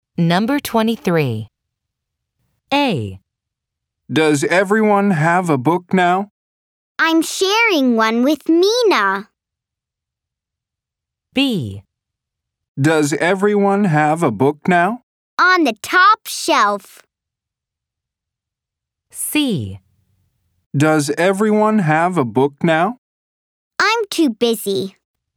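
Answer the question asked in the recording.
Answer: A: I'm sharing one with Mina.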